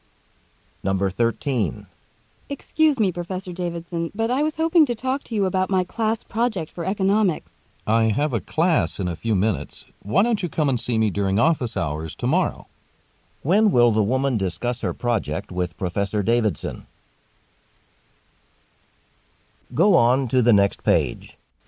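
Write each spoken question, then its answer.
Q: When will the woman discuss her project with Professor Davidson?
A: Tomorrow, during his office hours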